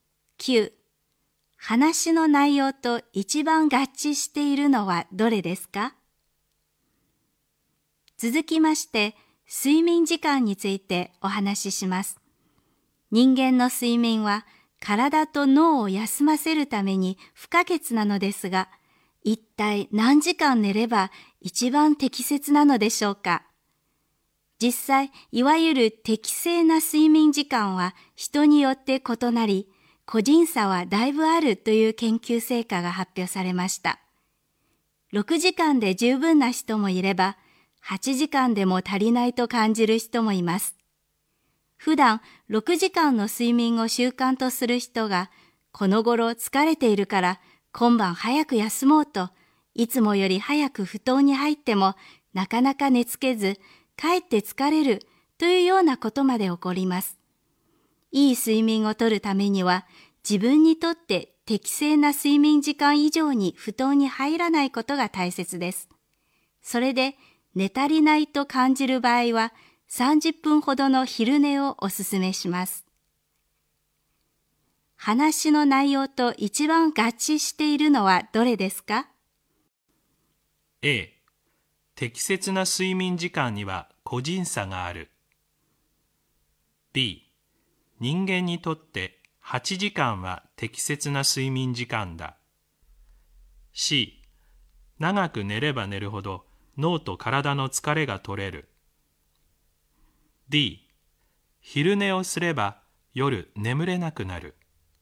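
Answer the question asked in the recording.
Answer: A: 適切な睡眠時間には個人差がある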